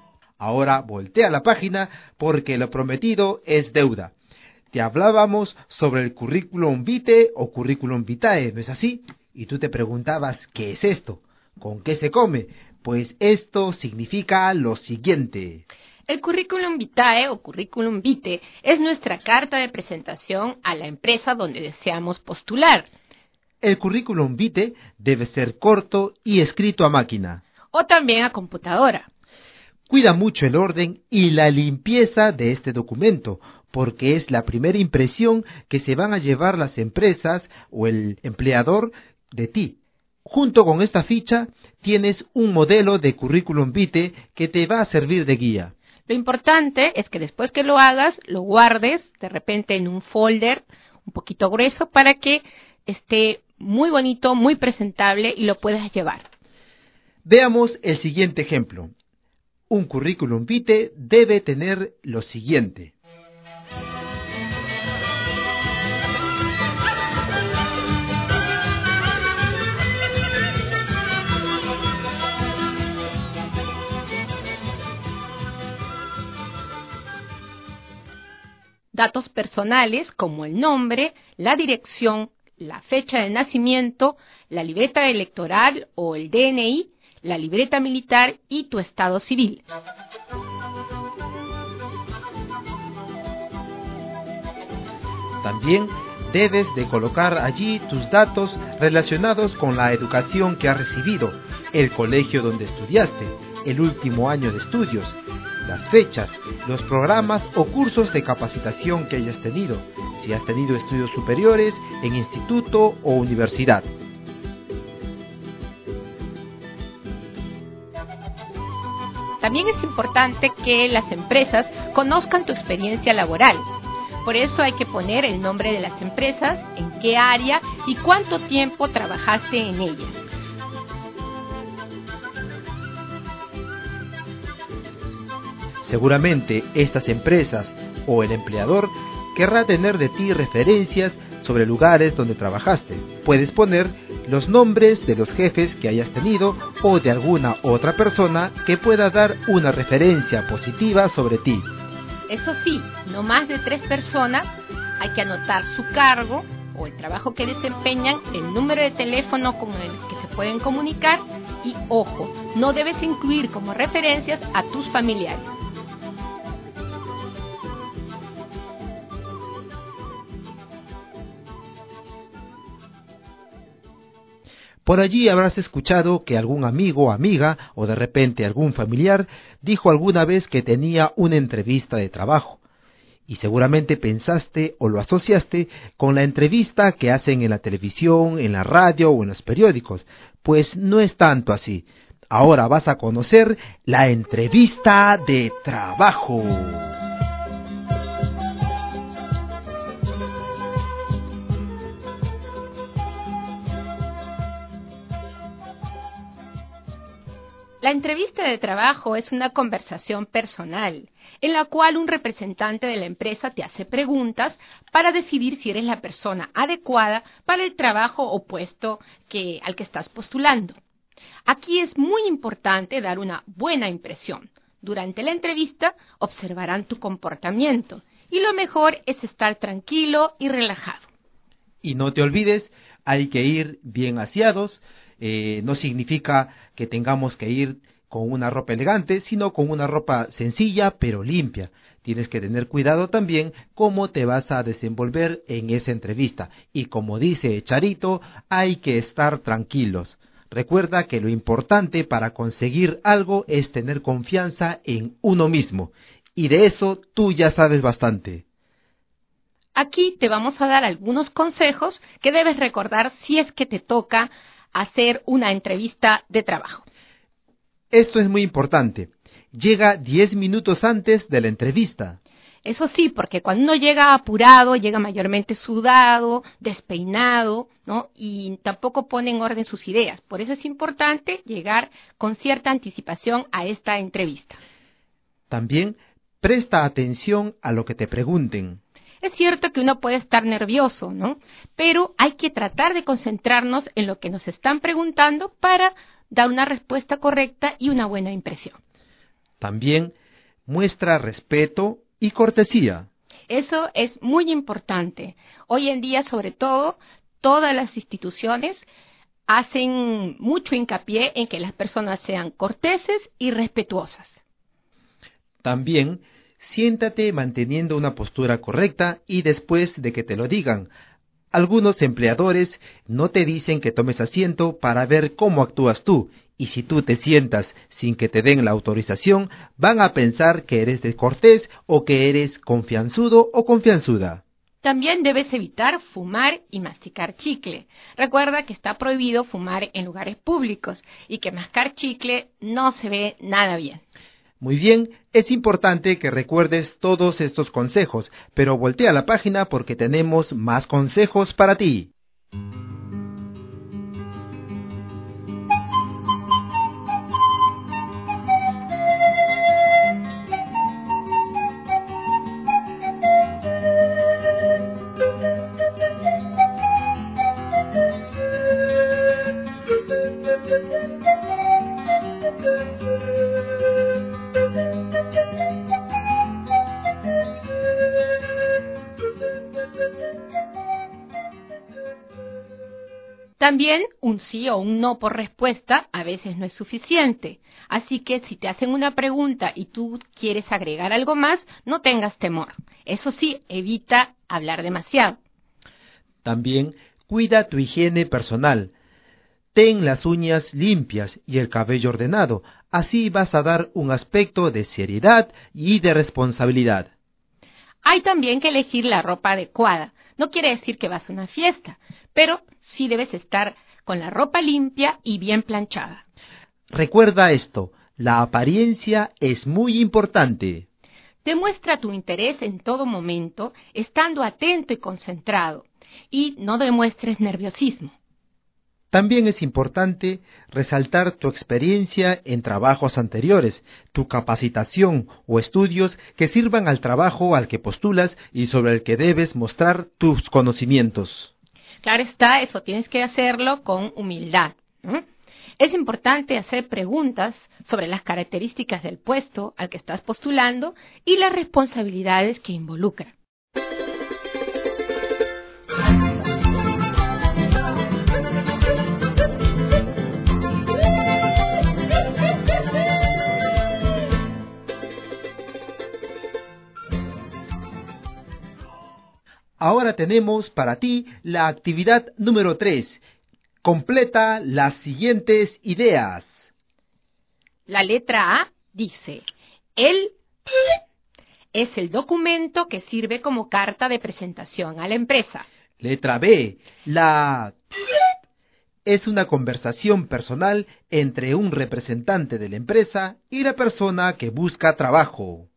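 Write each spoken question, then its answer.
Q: La letra A dice, el es el documento que sirve como carta de presentación a la empresa.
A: currículum vitae

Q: Letra B, la es una conversación personal entre un representante de la empresa y la persona que busca trabajo.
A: entrevista de trabajo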